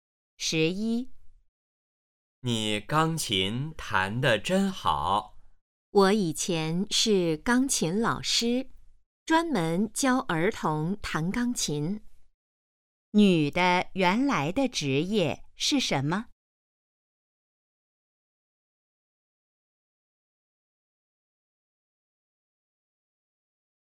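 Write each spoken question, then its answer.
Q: 女的原来的职业是什么?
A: 钢琴老师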